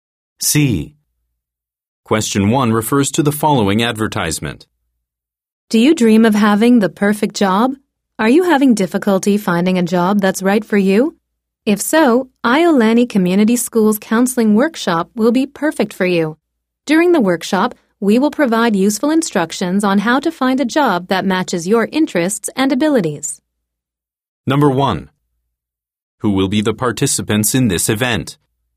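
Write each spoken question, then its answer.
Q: Who will be the participants in this event?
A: Job seekers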